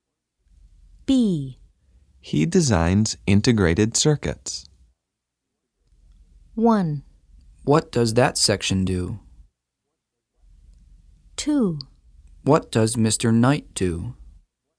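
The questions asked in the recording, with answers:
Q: He designs integrated circuits.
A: 2: What does Mr. Knight do?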